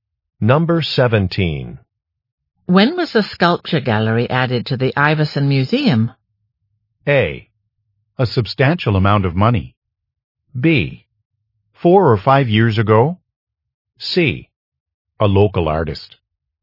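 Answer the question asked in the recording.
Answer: B: 4 or 5 years ago.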